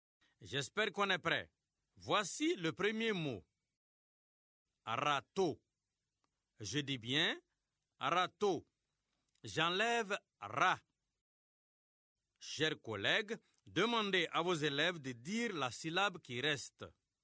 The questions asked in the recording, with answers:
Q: Râteau. Je dis bien râteau. J'enlève ra. Chers collègues, demandez à vos élèves de dire la syllabe qui reste.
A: Il reste tôt.